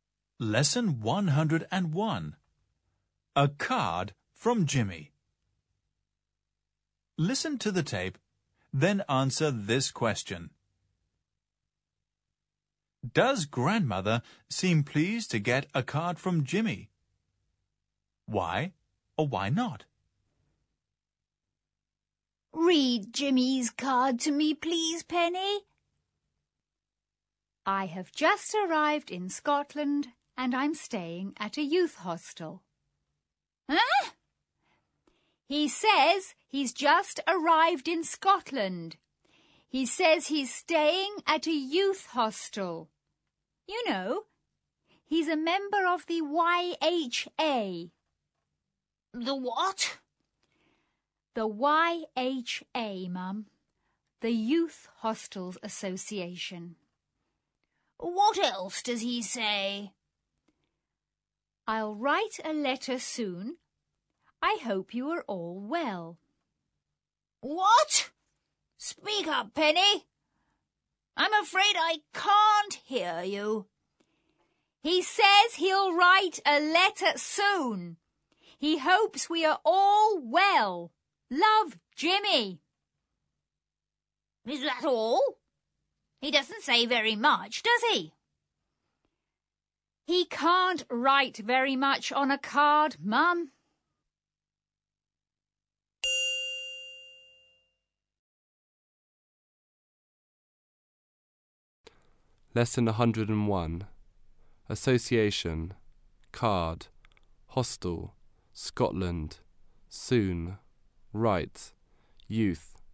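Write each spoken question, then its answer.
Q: Does grandmother seem pleased to get a card from Jimmy?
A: No, she thinks he doesn't say very much on the card.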